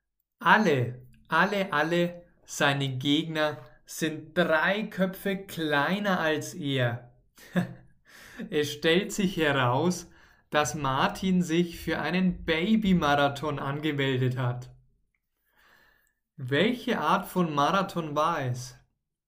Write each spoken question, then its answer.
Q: Welche Art von Marathon war es?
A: Ein Babymarathon. Es war ein Babymarathon.